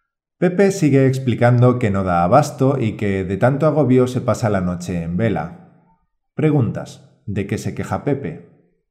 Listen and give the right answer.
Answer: Pepe se queja de que no da abasto con la cantidad de trabajo y que está agobiado.